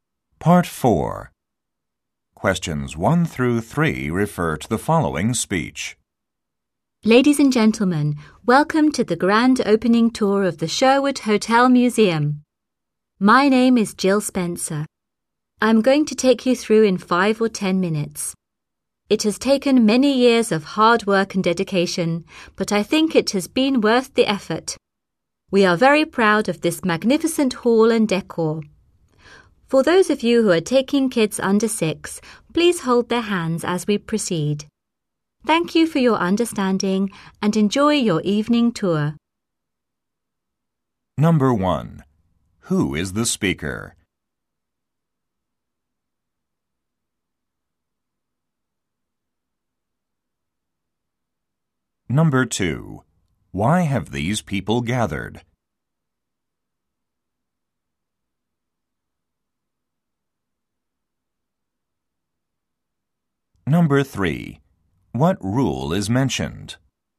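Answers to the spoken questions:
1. A tour guide, Jill Spencer
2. For the grand opening tour of the museum
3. Hold the hands of children under 6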